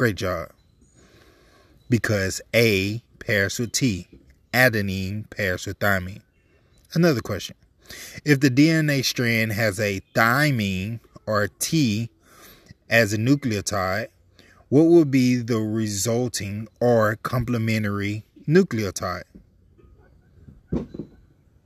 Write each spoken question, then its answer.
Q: If the DNA strand has a thymine or a T as a nucleotide, what would be the resulting or complementary nucleotide?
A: If you chose adenine, adenine is absolutely correct.